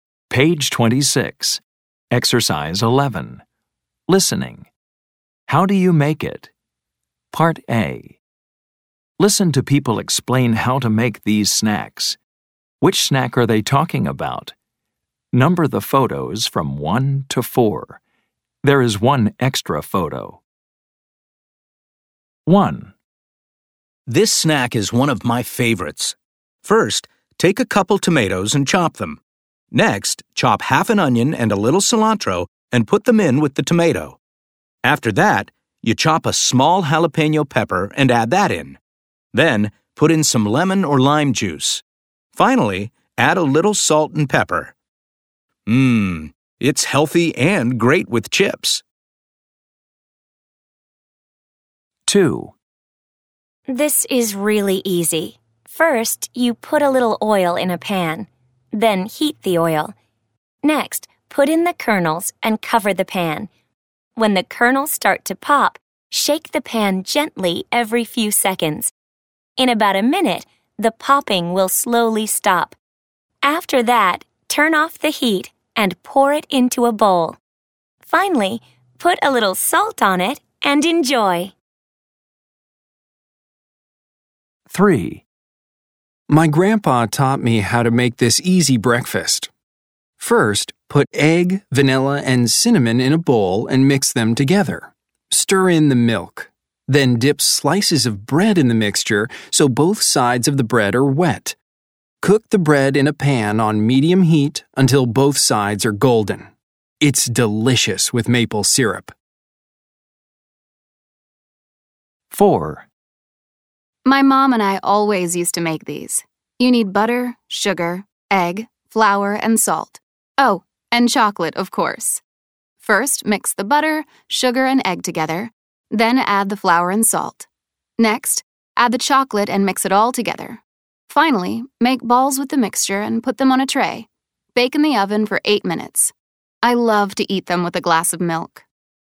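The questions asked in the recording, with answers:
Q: Which snack are they talking about?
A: salsa

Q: Which snack are they talking about?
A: popcorn

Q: Which snack are they talking about?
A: French toast

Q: Which snack are they talking about?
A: chocolate chip cookies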